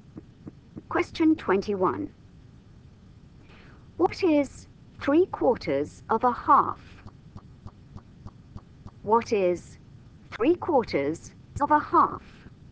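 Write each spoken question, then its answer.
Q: What is 3/4 of a half?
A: 3/8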